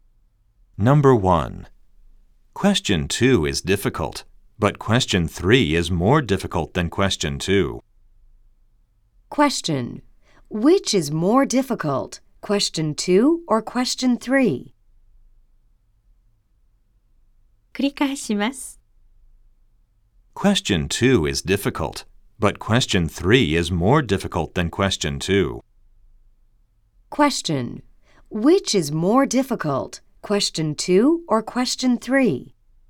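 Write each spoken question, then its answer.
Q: Which is more difficult, question 2 or question 3?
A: Question 3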